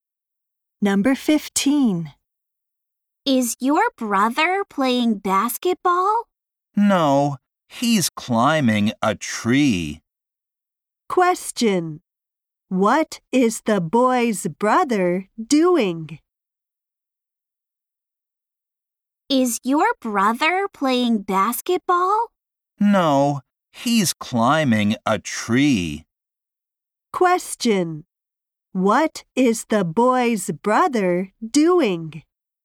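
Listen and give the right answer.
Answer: Climbing a tree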